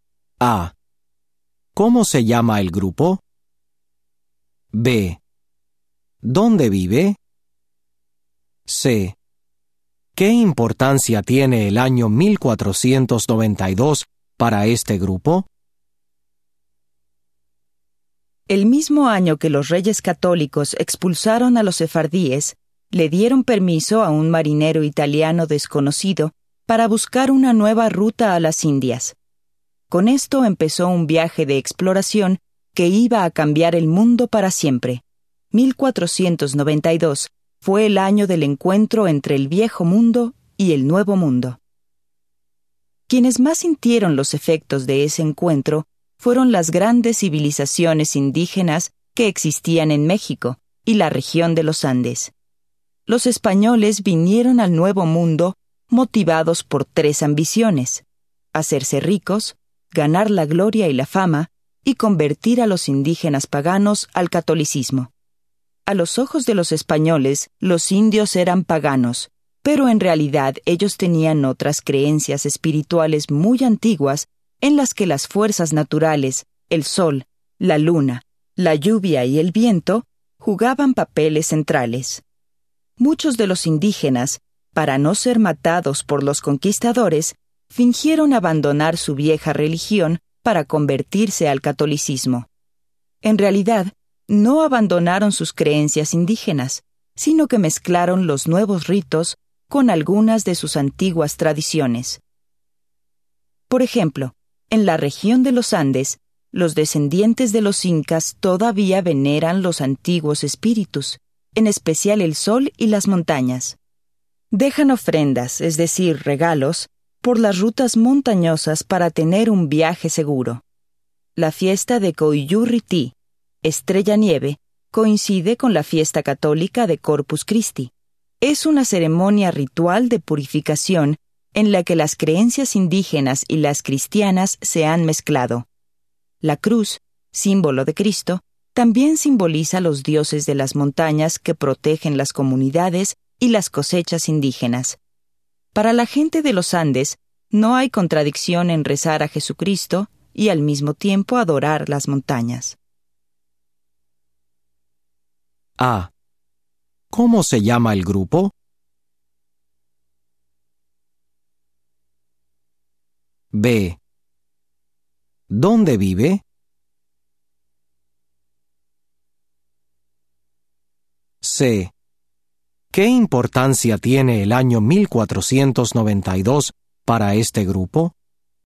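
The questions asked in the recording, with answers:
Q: ¿Dónde vive?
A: En México y la región de los Andes

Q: ¿Qué importancia tiene el año 1492 para este grupo?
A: Fue el año del encuentro entre el viejo mundo y el nuevo mundo, el principio de la llegada de los españoles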